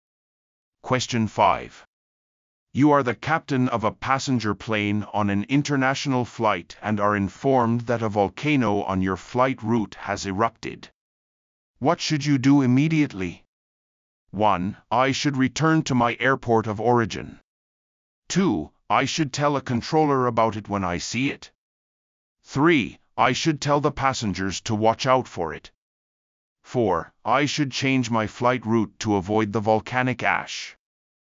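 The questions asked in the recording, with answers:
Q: What should you do immediately?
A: 4: I should change my flight route to avoid the volcanic ash.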